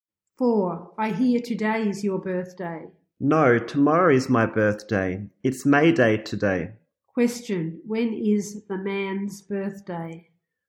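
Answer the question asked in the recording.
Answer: May 2nd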